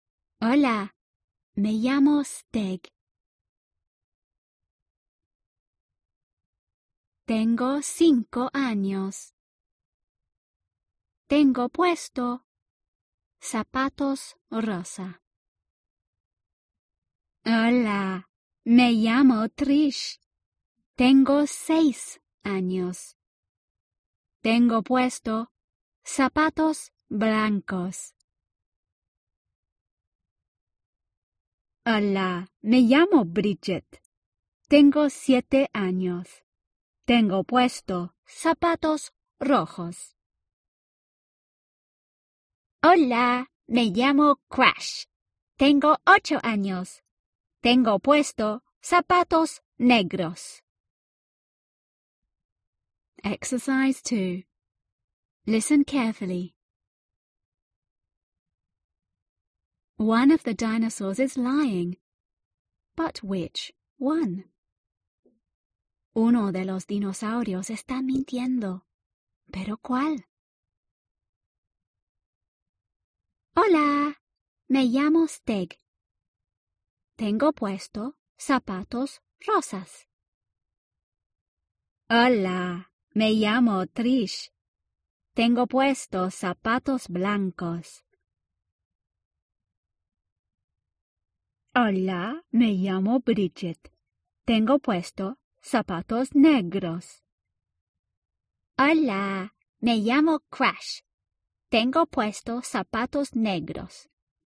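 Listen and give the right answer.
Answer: Bridget (she says black shoes but wears red shoes)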